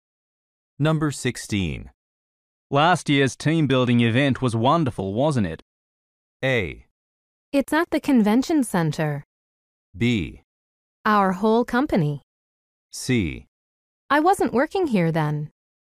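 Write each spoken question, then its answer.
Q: Last year's team building event was wonderful, wasn't it?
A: C: I wasn't working here then.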